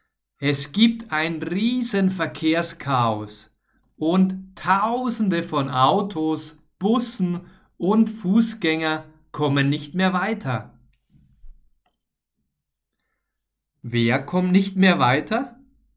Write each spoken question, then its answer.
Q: Wer kommt nicht mehr weiter?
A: Tausende von Autos, Bussen und Fußgängern.